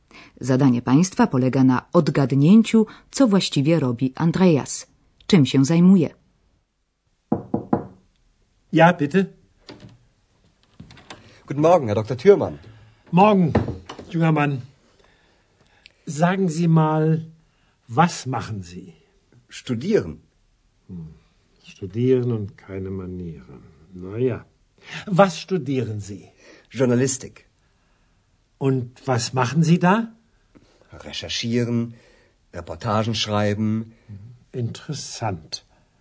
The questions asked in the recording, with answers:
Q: Zadanie Państwa polega na odgadnięciu, co właściwie robi Andreas.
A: Andrea zatem studiuje dziennikarstwo.